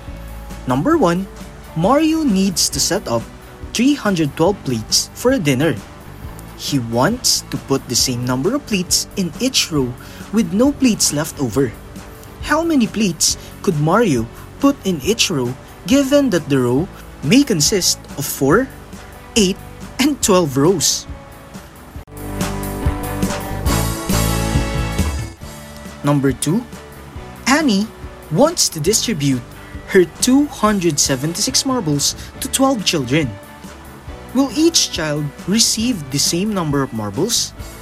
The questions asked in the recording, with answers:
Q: How many plates could Mario put in each row given that the row may consist of 4, 8, and 12 rows?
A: For number 1, if the number of rows is 4, the answer is 78.

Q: Will each child receive the same number of marbles?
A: For number 2, each children will receive the same number of marbles because 276 is divisible by 12.